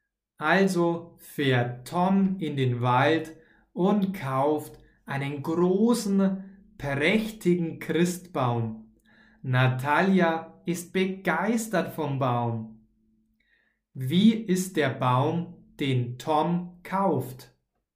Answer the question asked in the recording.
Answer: Groß und prächtig. Der Baum, den Tom kauft, ist groß und prächtig.